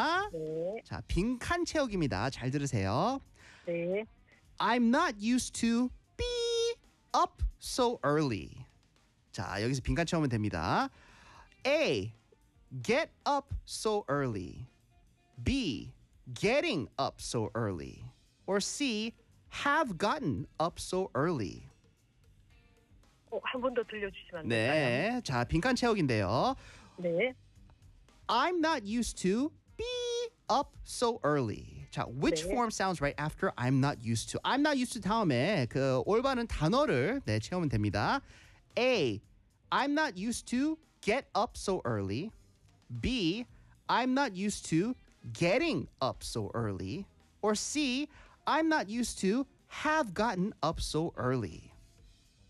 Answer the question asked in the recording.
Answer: 아 B예요 B. I'm not used to getting up so early.